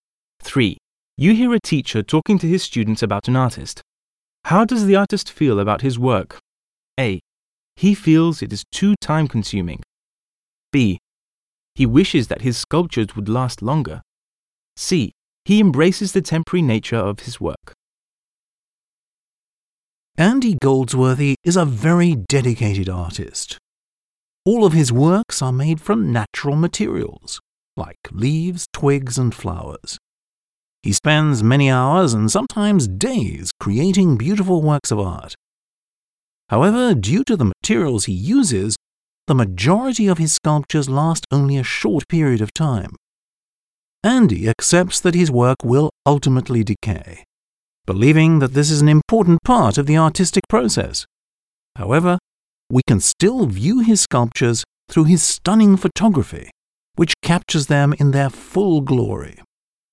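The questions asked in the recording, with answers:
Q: How does the artist feel about his work?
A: C: He embraces the temporary nature of his work.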